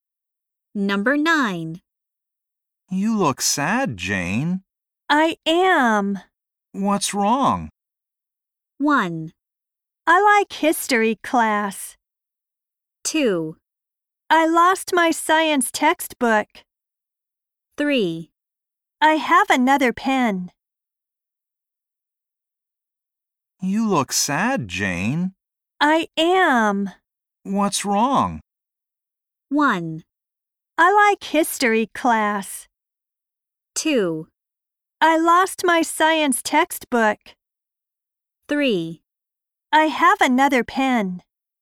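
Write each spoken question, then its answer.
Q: What's wrong?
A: 2: I lost my science textbook.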